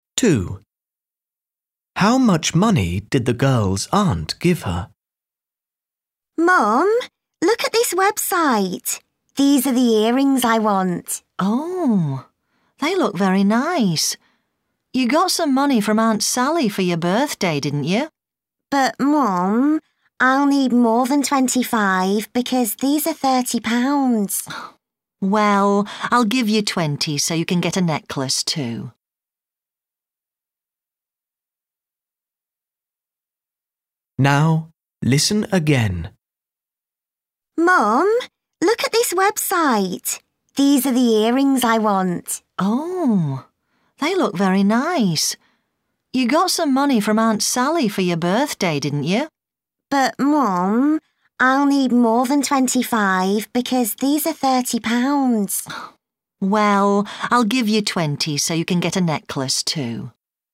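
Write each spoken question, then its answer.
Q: How much money did the girl's aunt give her?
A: £25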